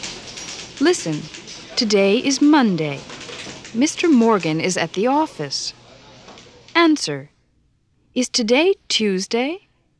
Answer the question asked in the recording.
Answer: No, it's not.